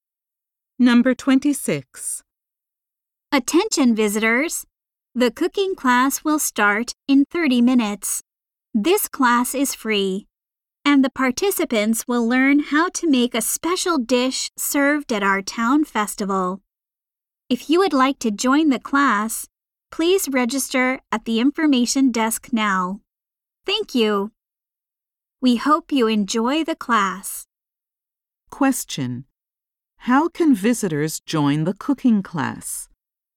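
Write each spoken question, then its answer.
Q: How can visitors join the cooking class?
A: By registering at the information desk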